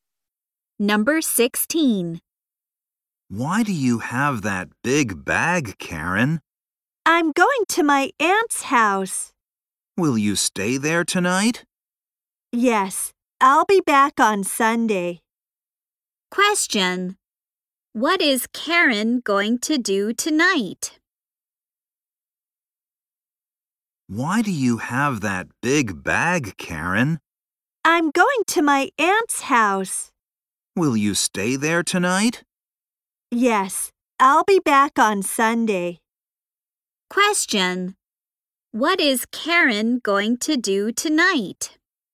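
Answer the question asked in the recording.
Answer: Stay at her aunt's house.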